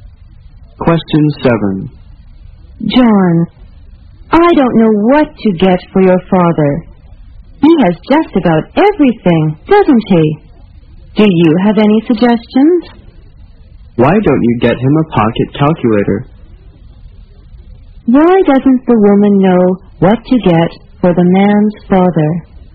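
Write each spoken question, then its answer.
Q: Why doesn't the woman know what to get for the man's father?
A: He has just about everything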